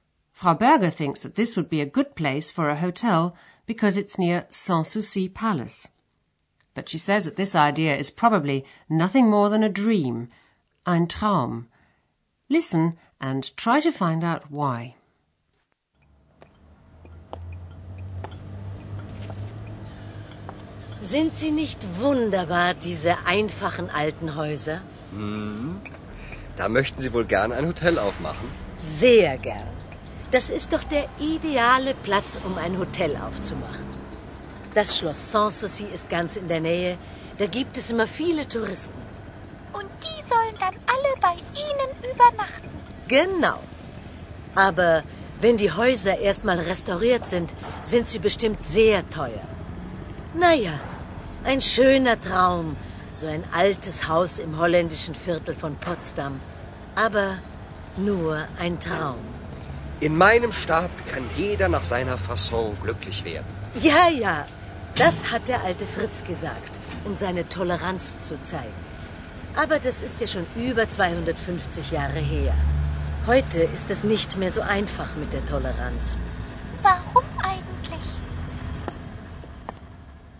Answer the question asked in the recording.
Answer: Frau Berger reckons that the houses in the Dutch Quarter will be very expensive once they've been restored.